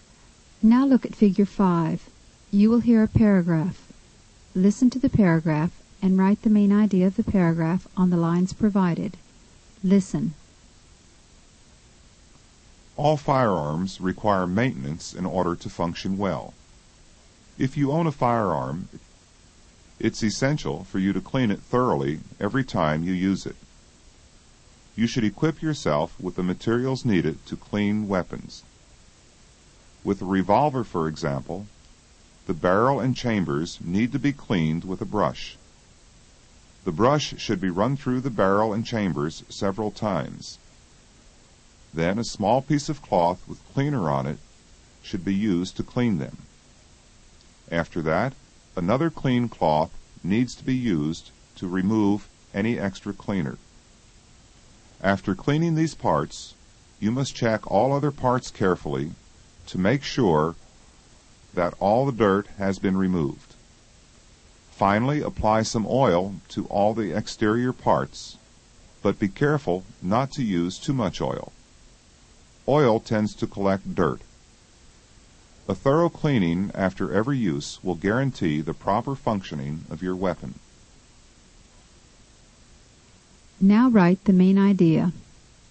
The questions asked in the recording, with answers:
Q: Now write the main idea.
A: The main idea is, all firearms require maintenance in order to function well.